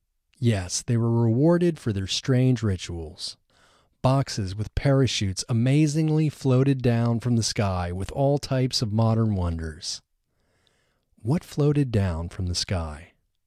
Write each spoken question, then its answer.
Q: What floated down from the sky?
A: Boxes with parachutes floated down from the sky.